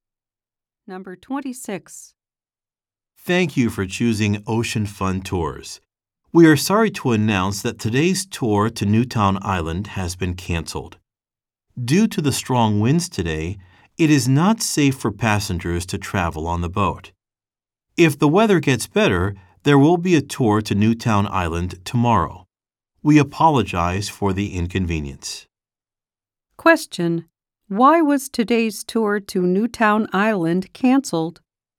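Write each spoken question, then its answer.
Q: Why was today's tour to Newtown Island canceled?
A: Because of strong winds.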